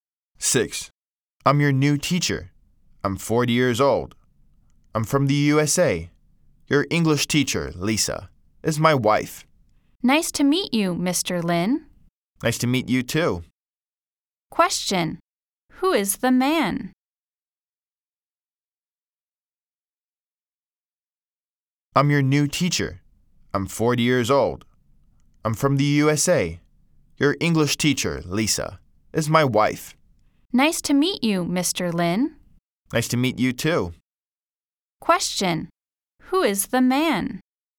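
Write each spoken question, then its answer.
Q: Question, who is the man?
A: Mr. Lin, the new teacher from the USA (Lisa's husband)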